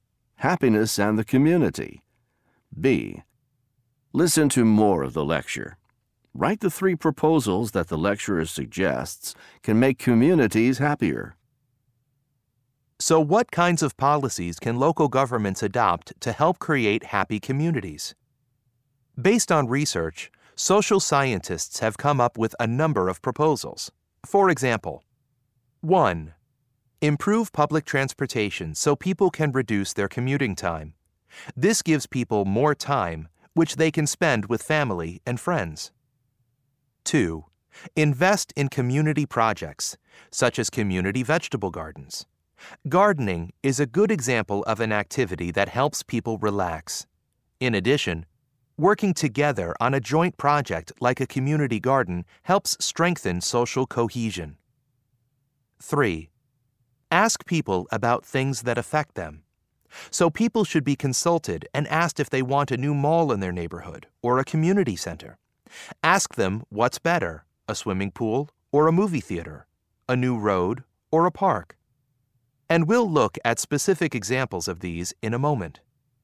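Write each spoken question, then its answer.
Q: Write the three proposals that the lecturer suggests can make communities happier.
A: Improve public transportation to reduce commuting time; invest in community projects such as community vegetable gardens; ask (consult) people about things that affect them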